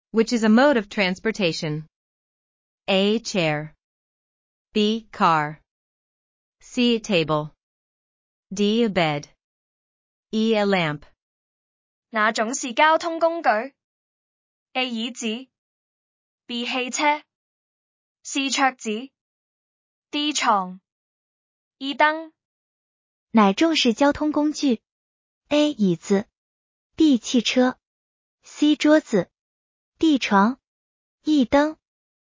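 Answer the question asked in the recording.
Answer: B: 汽车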